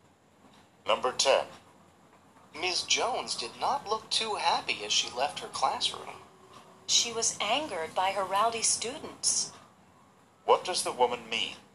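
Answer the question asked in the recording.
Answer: Ms. Jones was angry because her students were rowdy.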